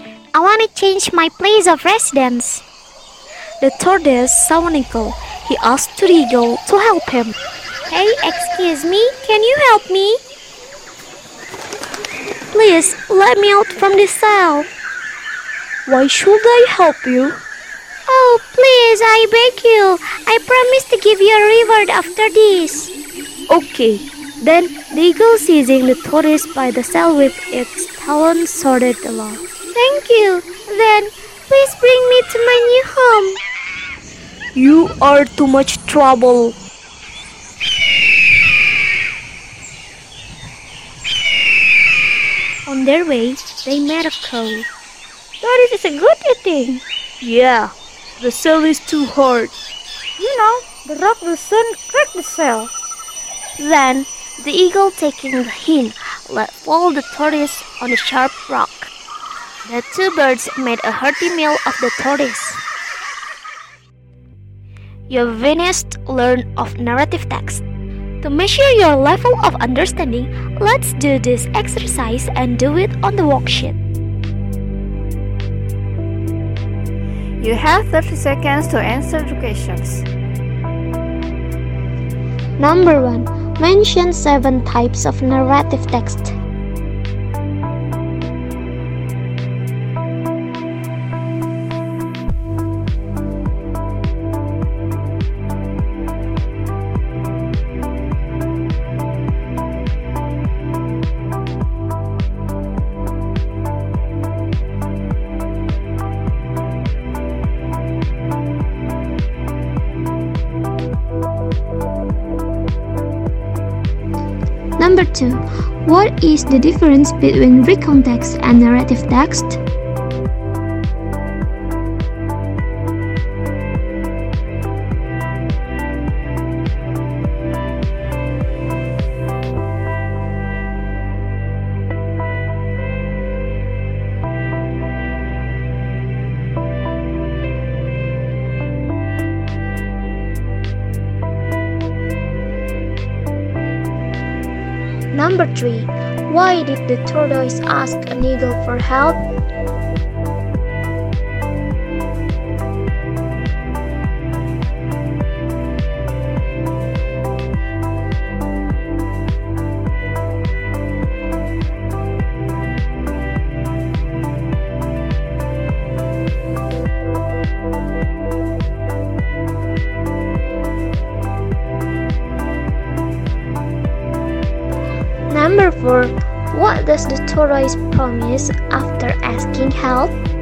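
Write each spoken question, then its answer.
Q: Why did the tortoise ask an eagle for help?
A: Because he wanted to change his place of residence (move to a new home).

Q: for what does the tortoise promise after asking help?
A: To give the eagle a reward.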